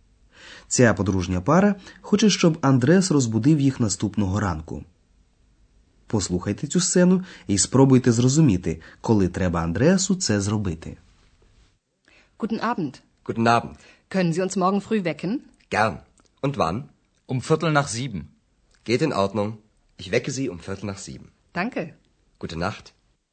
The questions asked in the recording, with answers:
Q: Послухайте цю сцену і спробуйте зрозуміти, коли треба Андреасу це зробити.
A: Андреас повинен розбудити їх о фіртель чверті нах зібен після сьомої, тобто о сьомій п'ятнадцять.